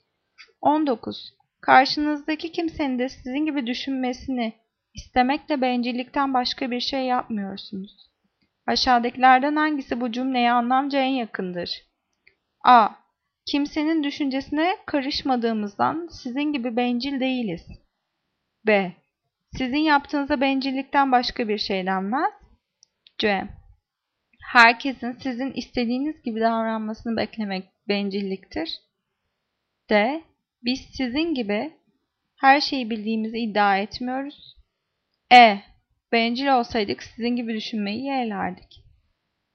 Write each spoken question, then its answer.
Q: Aşağıdakilerden hangisi bu cümleye anlamca en yakındır?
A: Cevap C. Herkesin sizin istediğiniz gibi davranmasını beklemek bencilliktir.